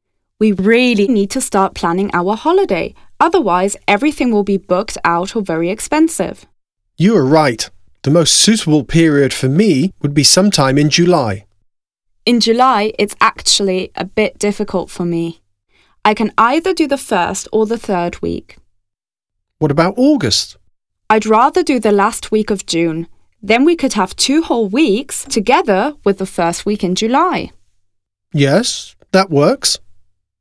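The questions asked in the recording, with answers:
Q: When are they going on holiday?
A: Last week of June and first week of July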